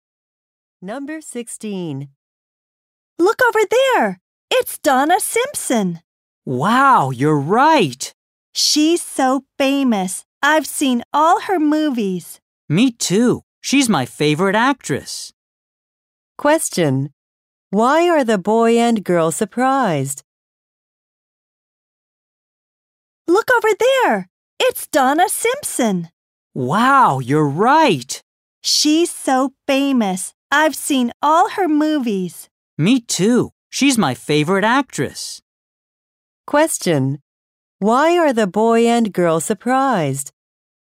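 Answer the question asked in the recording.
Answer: They see a famous actress, Donna Simpson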